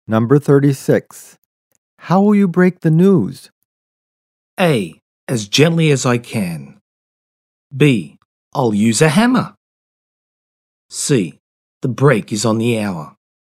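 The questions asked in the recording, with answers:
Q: How will you break the news?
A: A: As gently as I can.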